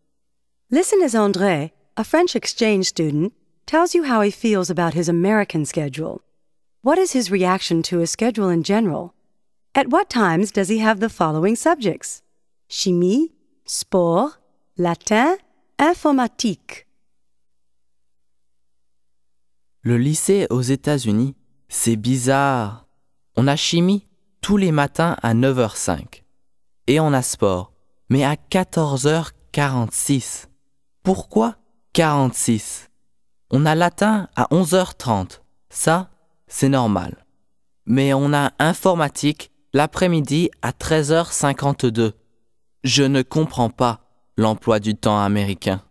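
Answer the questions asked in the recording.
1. He finds it strange and doesn't understand it
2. Chimie 9h05, sport 14h46, latin 11h30, informatique 13h52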